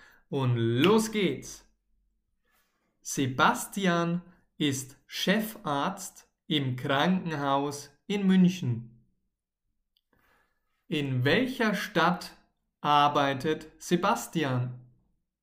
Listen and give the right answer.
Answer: In München. Sebastian arbeitet in München.